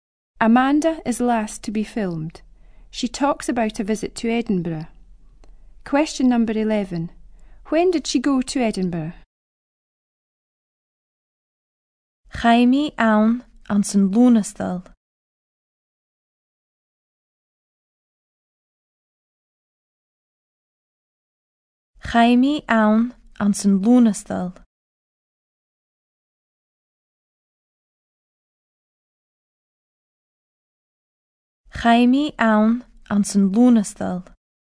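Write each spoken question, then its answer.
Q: When did she go to Edinburgh?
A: In August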